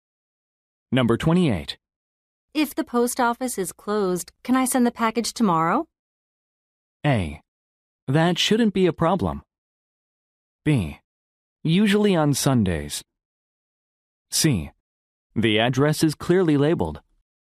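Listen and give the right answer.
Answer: A: That shouldn't be a problem.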